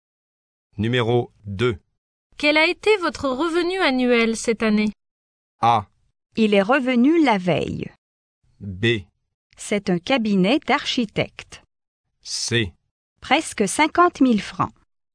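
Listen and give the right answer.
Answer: C: Presque 50 000 francs.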